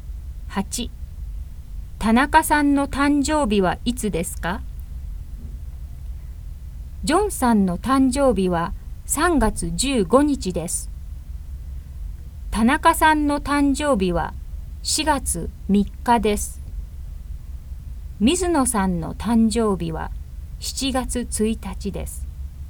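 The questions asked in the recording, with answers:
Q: 田中さんの誕生日はいつですか?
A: 4月3日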